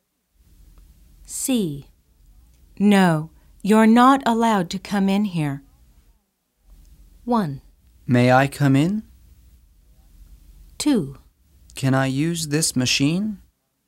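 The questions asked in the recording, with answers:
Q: No, you're not allowed to come in here.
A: 1: May I come in?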